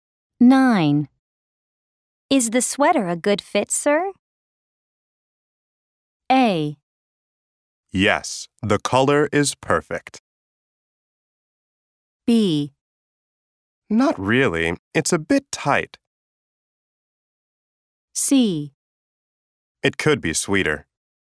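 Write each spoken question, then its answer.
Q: Is the sweater a good fit, sir?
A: B: Not really, it's a bit tight.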